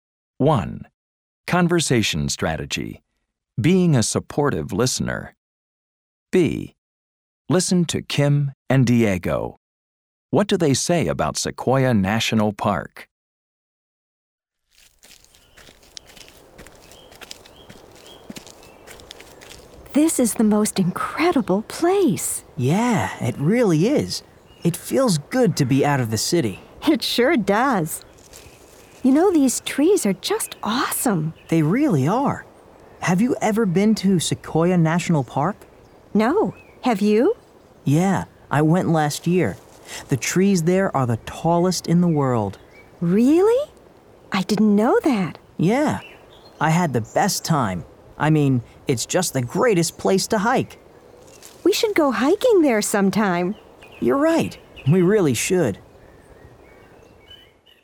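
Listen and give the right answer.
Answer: Its trees are the tallest in the world, it's the greatest place to hike, and they should go hiking there sometime.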